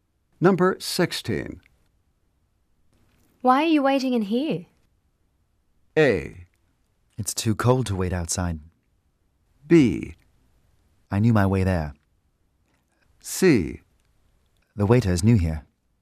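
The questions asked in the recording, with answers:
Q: Why are you waiting in here?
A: A: It's too cold to wait outside.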